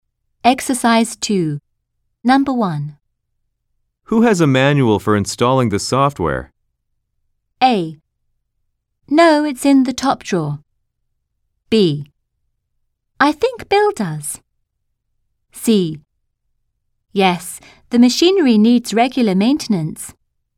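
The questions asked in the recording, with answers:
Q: Who has a manual for installing the software?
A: B: I think Bill does.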